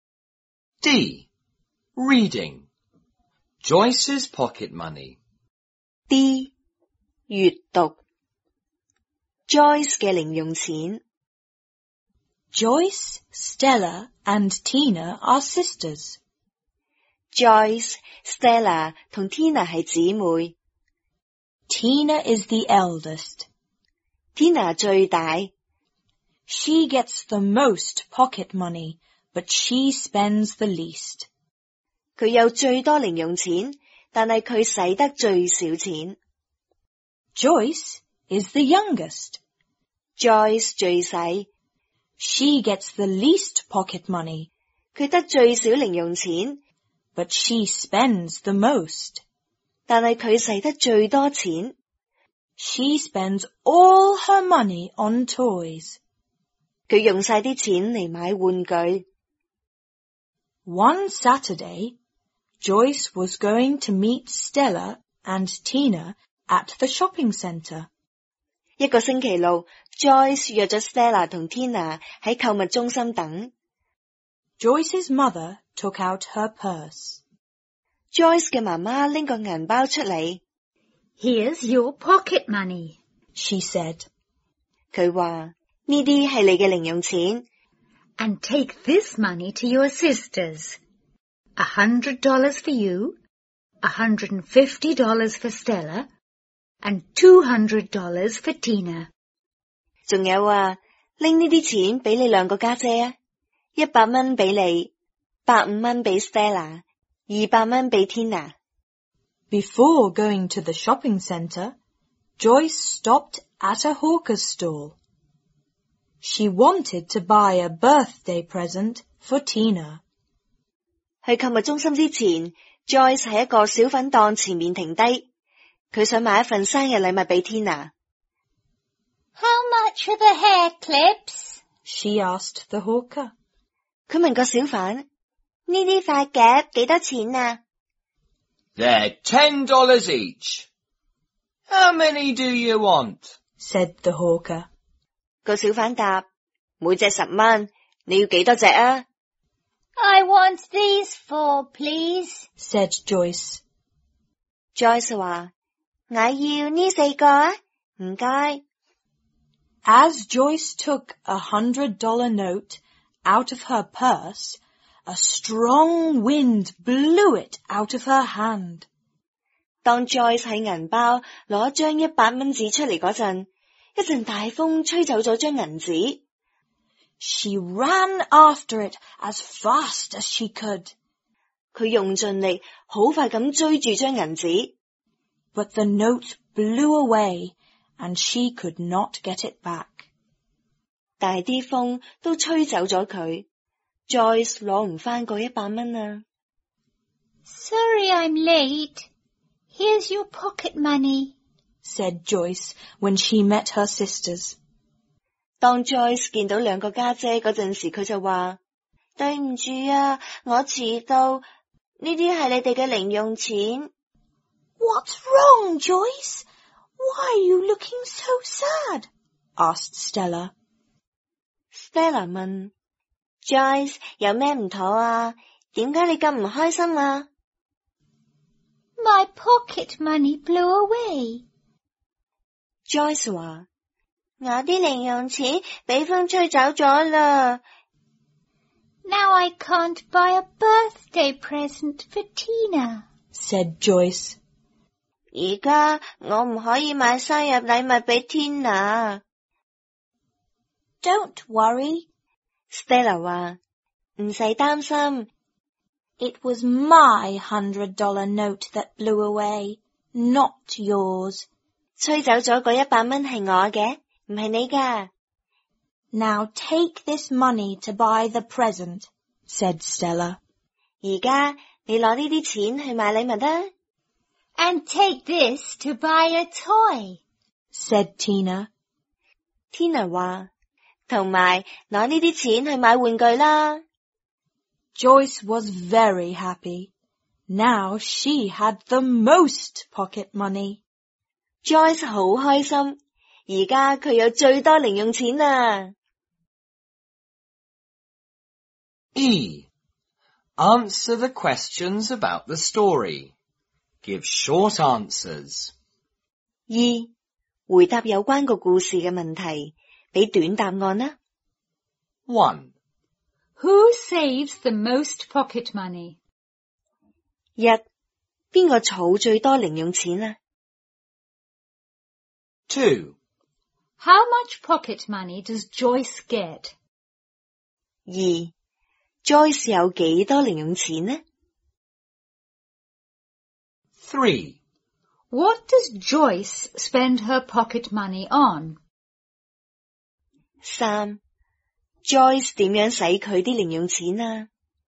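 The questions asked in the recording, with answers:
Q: Who saves the most pocket money?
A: Tina

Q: How much pocket money does Joyce get?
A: $100

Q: What does Joyce spend her pocket money on?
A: Toys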